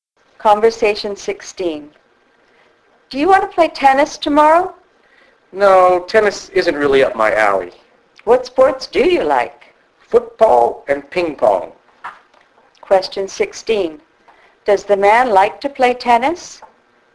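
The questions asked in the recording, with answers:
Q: Does the man like to play tennis?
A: No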